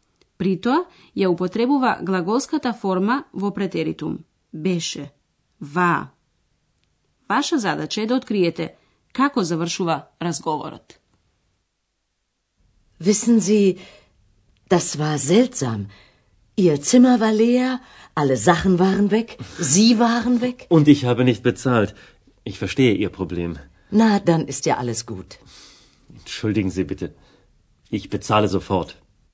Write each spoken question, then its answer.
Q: Vaša zadaća je da otkrijete kako završava razgovorat.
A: Веројатно разбравте дека господин Мајер сака да плати